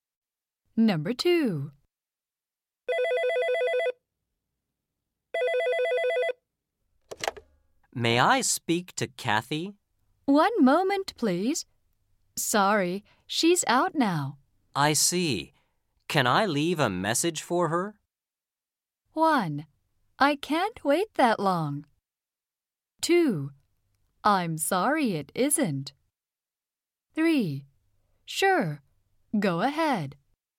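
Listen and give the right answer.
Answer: 3: Sure, go ahead.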